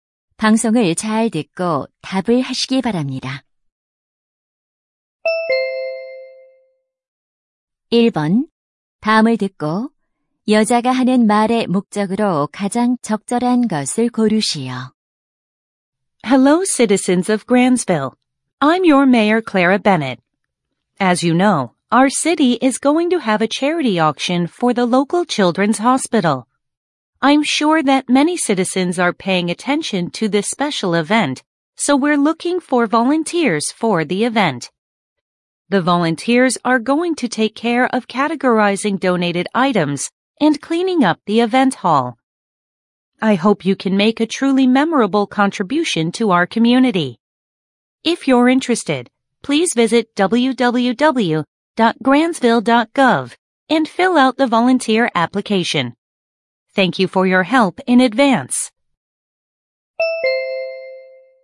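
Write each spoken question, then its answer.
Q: 다음을 듣고 여자가 하는 말의 목적으로 가장 적절한 것을 고르시오.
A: 자선 경매 행사 자원봉사자 모집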